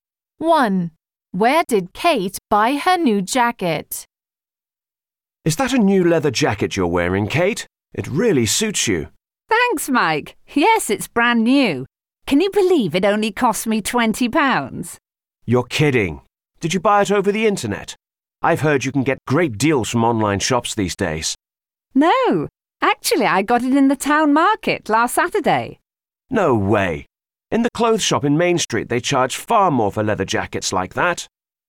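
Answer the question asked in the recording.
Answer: In the town market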